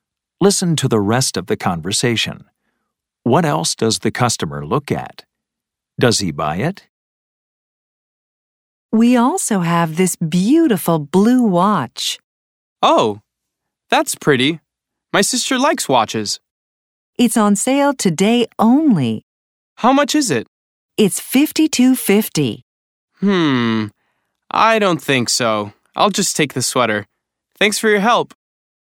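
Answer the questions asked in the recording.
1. a blue watch
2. No, he just takes the sweater.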